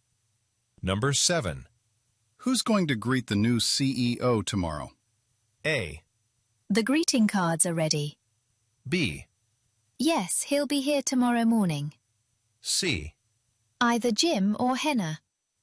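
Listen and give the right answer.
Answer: C: Either Jim or Henna.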